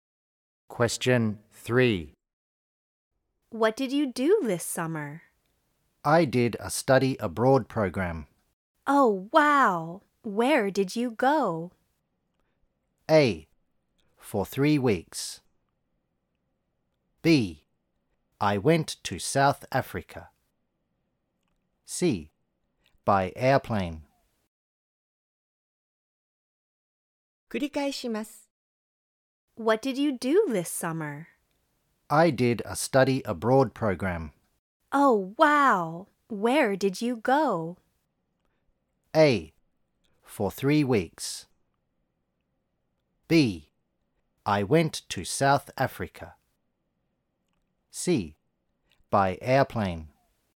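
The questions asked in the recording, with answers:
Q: Oh, wow! Where did you go?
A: B: I went to South Africa.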